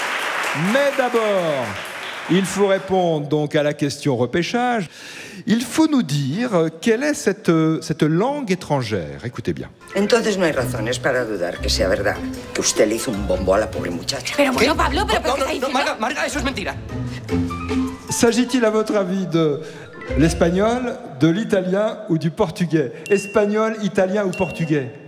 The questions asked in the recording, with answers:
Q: S'agit-il, à votre avis, de l'espagnol, de l'italien ou du portugais?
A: Mais c'est de l'espagnol, vous avez reconnu tout de suite.